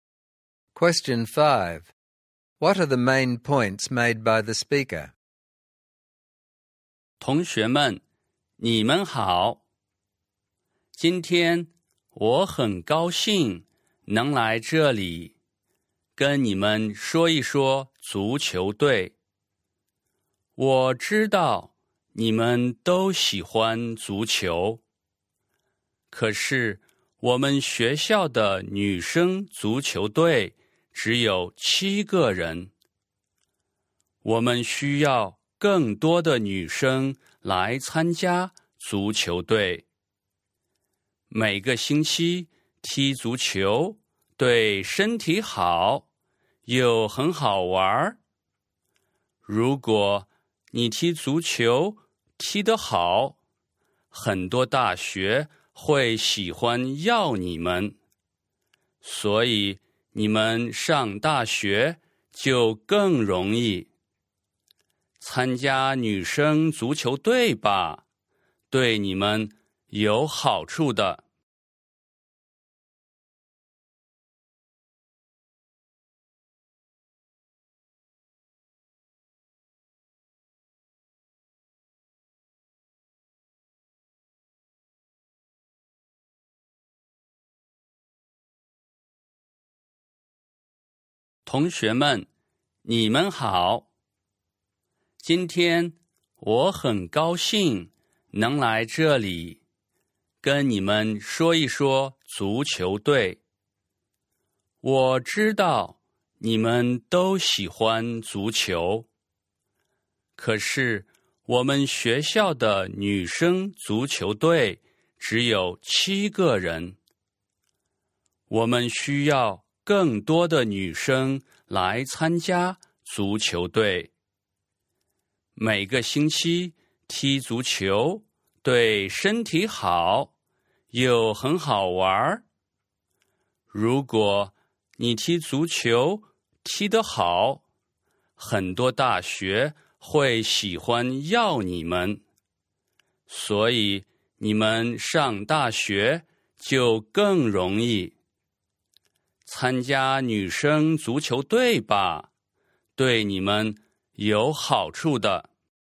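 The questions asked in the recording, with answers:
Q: What are the main points made by the speaker?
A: The girls' soccer team has only 7 players and needs more girls; playing soccer is healthy and fun, and playing well makes it easier to get into university.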